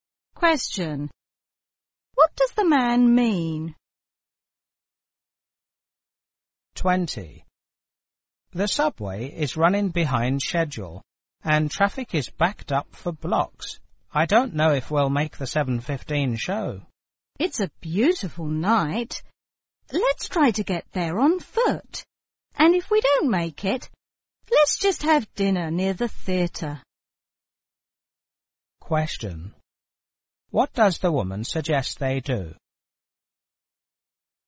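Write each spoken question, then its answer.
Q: What does the woman suggest they do?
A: Walk to the theatre.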